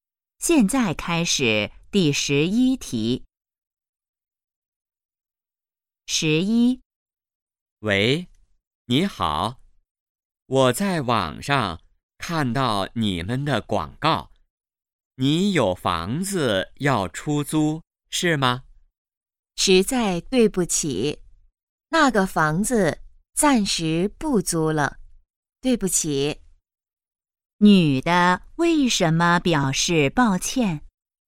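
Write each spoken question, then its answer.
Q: 女的为什么表示抱歉?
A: 房子暂时不租了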